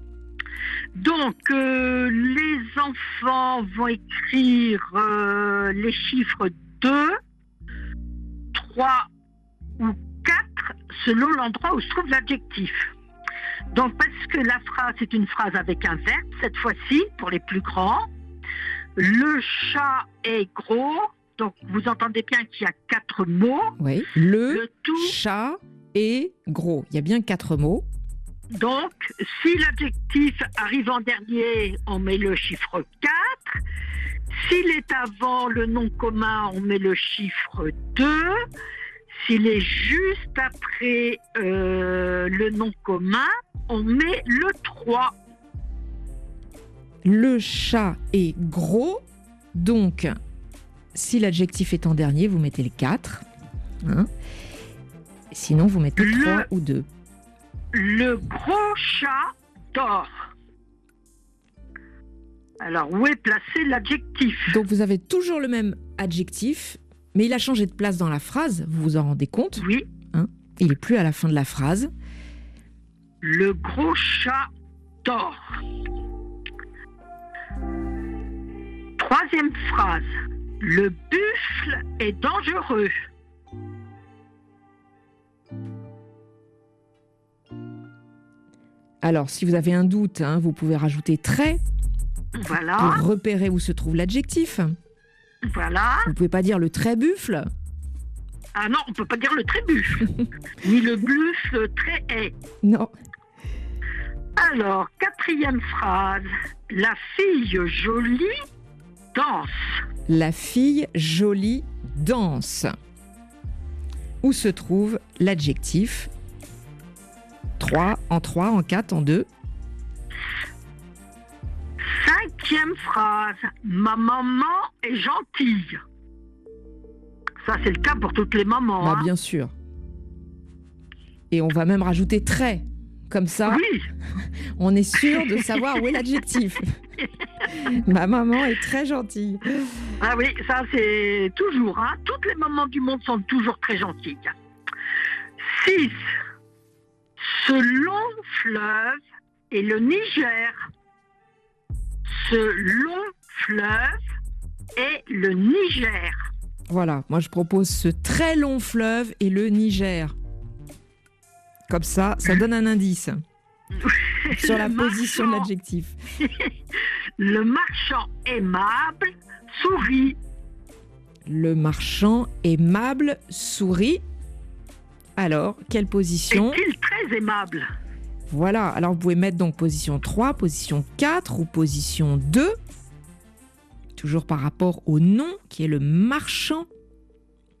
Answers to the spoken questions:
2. Le gros chat dort. Il était en deux.
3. En quatre.
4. La fille jolie danse était en position 3.
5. donc en quatrième position.
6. c'était en position 2.
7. C'était en 3, le marchand très aimable sourit.